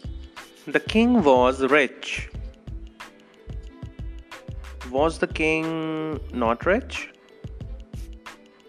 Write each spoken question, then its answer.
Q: Was the king not rich?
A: No, he was rich.